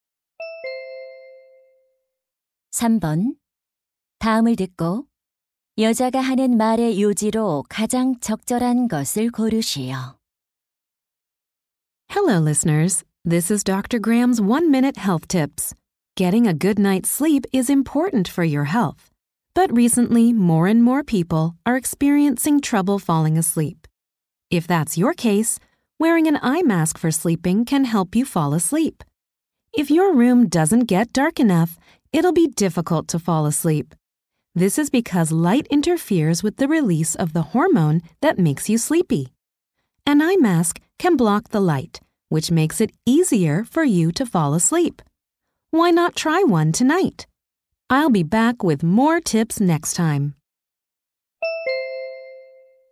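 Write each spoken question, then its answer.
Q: 다음을 듣고 여자가 하는 말의 요지로 가장 적절한 것을 고르시오.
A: 수면 안대를 쓰면 잠드는 데 도움이 된다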